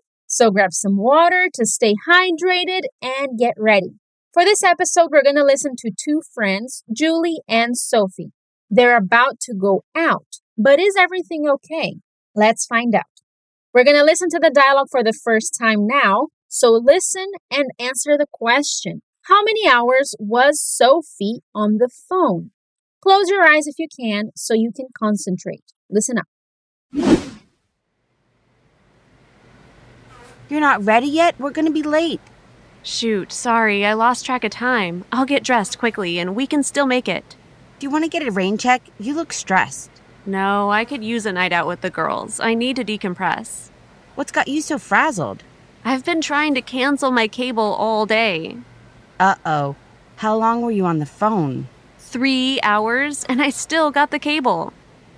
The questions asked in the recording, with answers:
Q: How many hours was Sophie on the phone?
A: Oh no, three hours on the phone?